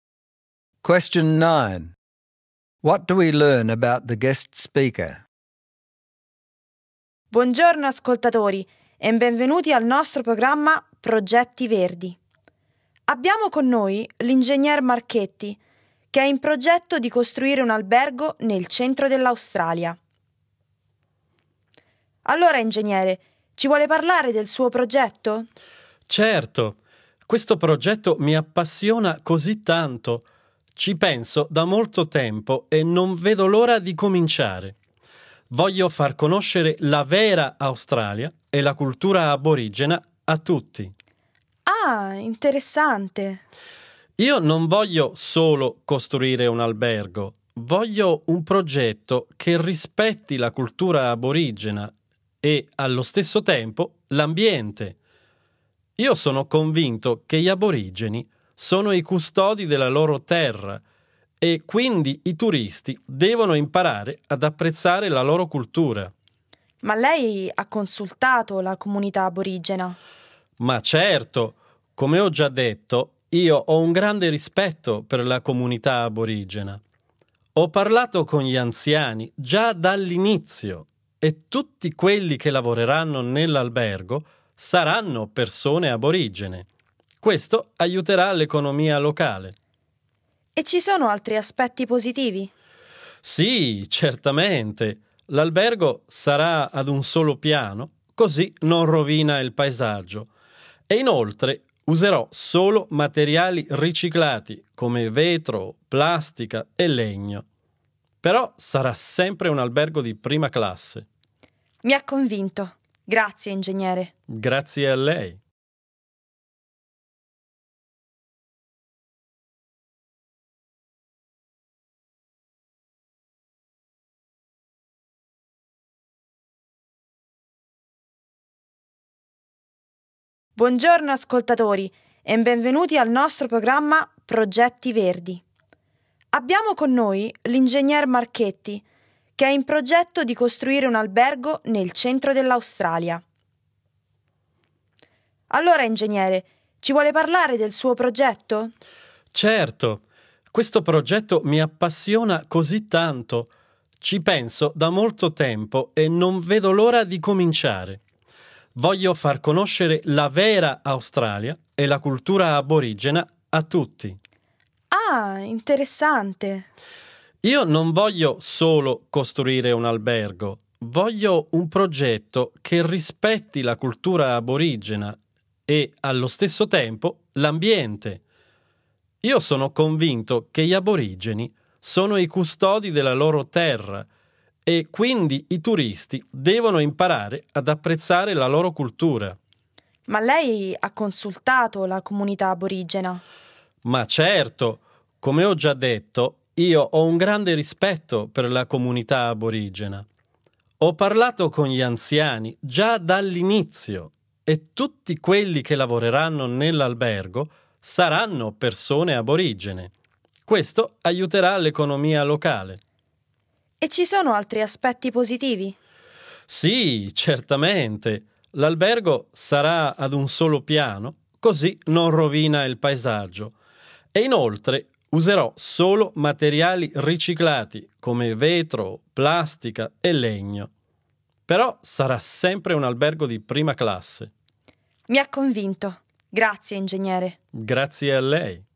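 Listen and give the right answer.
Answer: He is an engineer who is passionate about building an eco-friendly hotel in central Australia that respects Aboriginal culture. He consulted the elders, will employ only Aboriginal staff, and will build a single-storey, first-class hotel from recycled materials.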